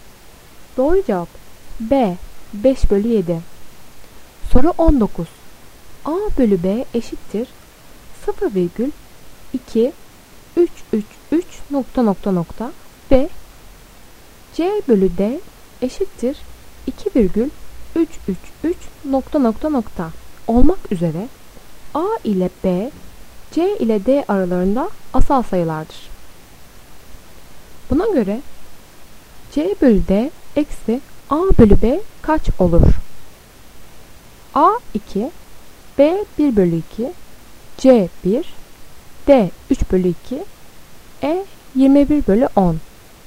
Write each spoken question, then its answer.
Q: Buna göre C bölü D eksi A bölü B kaç olur?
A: Doğru cevap E 21 bölü 10.